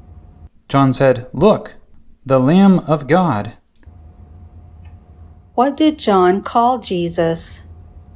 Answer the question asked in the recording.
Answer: John called Jesus the Lamb of God.